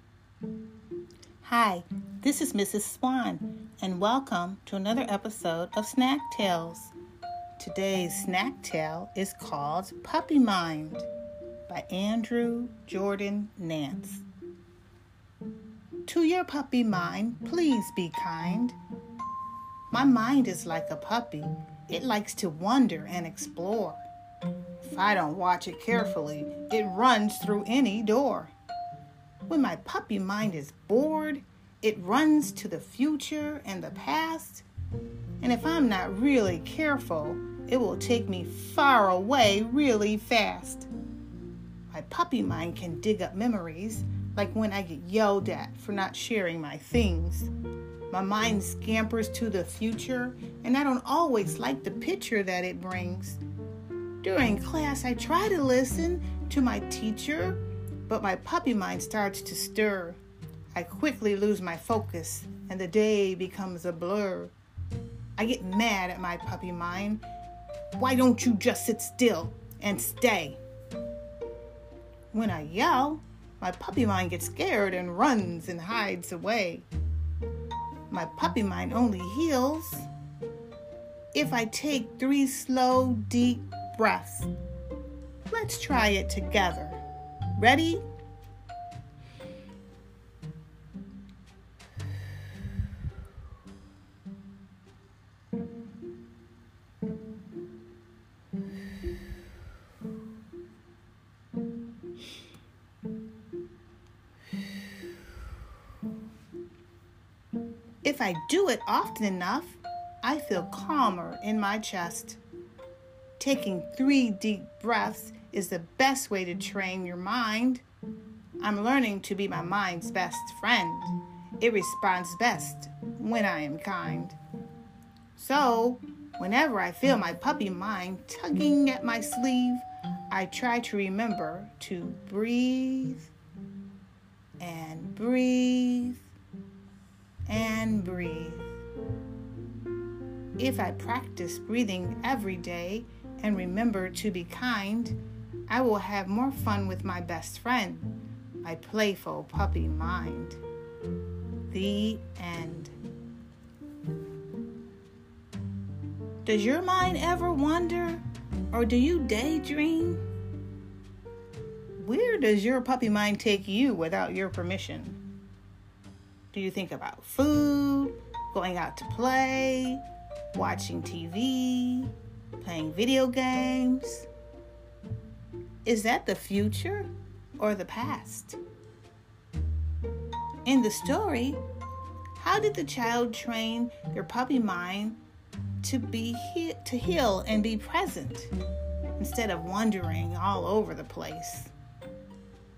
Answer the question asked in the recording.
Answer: If you guess that the child used their breath, you're right.